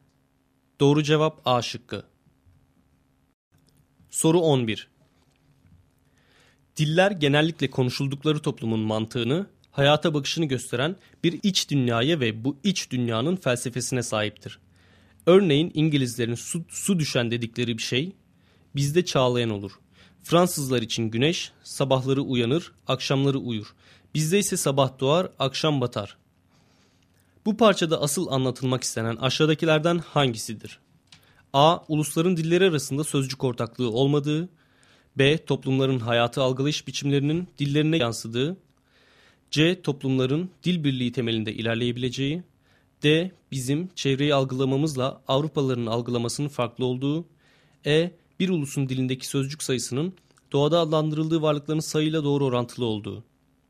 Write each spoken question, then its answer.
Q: Bu parçada asıl anlatılmak istenen aşağıdakilerden hangisidir?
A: Doğru cevap B şıkkı.